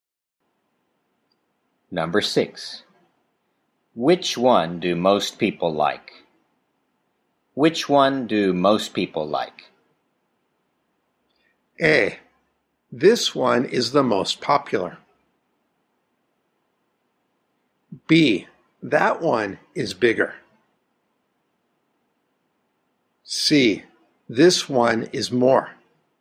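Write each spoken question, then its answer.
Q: Which one do most people like?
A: A: This one is the most popular.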